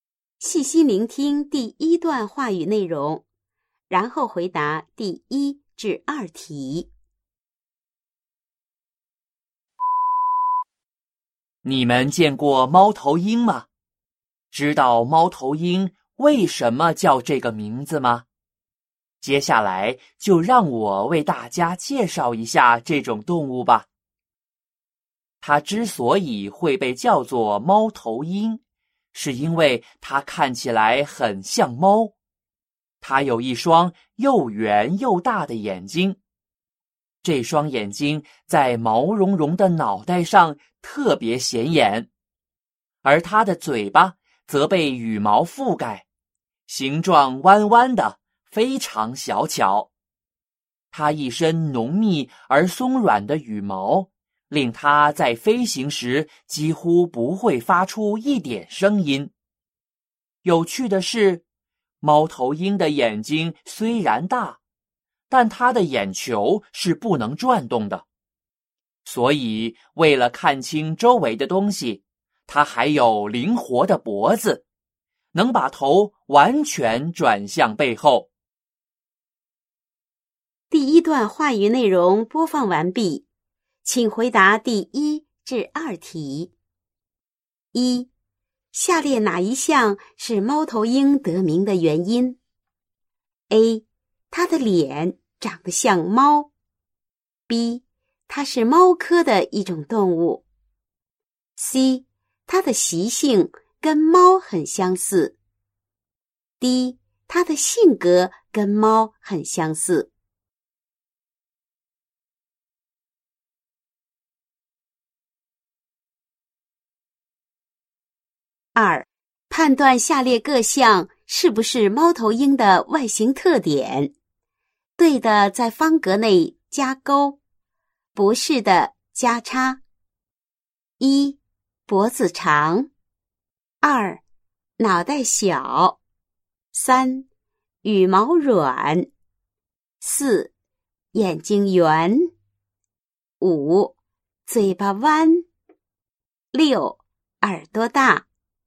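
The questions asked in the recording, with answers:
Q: 下列哪一项是猫头鹰得名的原因?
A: A: 它的脸长得像猫。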